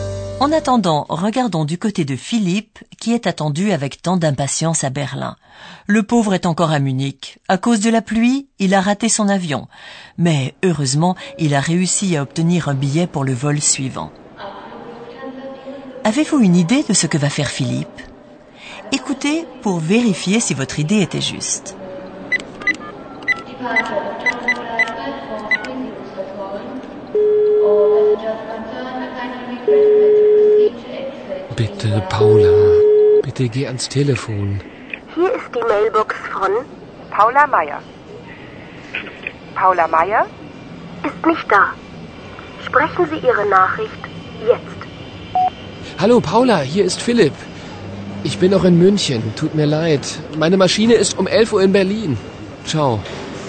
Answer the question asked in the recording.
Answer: vous aurez certainement compris que Philippe essaye d'appeler Paola.